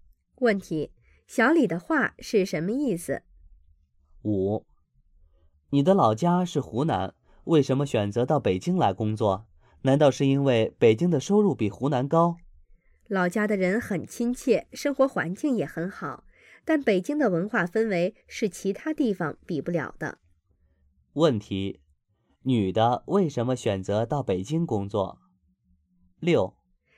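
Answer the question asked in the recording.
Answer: 因为北京的文化氛围是其他地方比不了的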